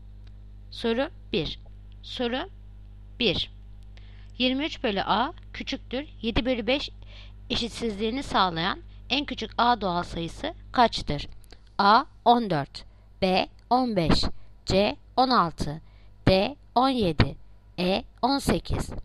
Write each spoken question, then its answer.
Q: 7 bölü 5 eşitsizliğini sağlayan en küçük a doğal sayısı kaçtır?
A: Yanıt Diyarbakır 17.